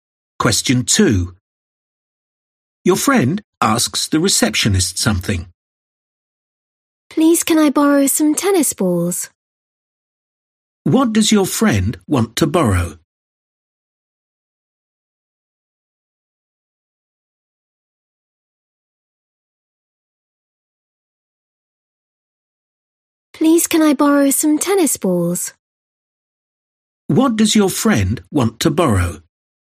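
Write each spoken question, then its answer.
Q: What does your friend want to borrow?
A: some tennis balls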